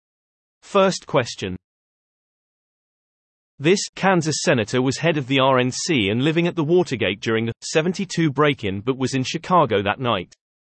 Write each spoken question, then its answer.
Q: This Kansas senator was head of the RNC and living at the Watergate during the 72 break-in but was in Chicago that night.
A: The answer is Bob Dole.